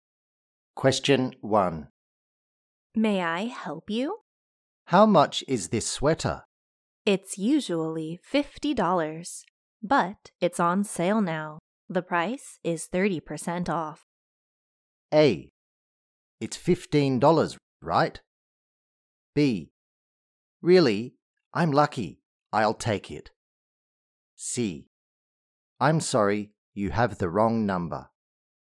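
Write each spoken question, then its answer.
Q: How much is this sweater?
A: B: Really? I'm lucky. I'll take it.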